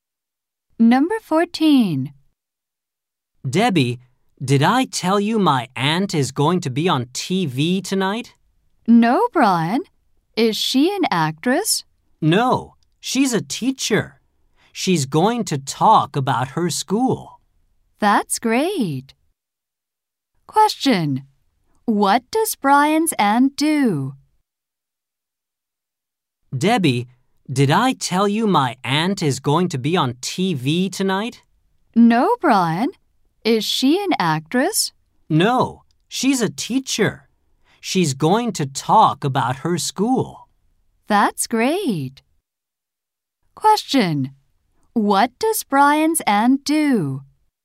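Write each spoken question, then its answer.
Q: What does Brian's aunt do?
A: She is a teacher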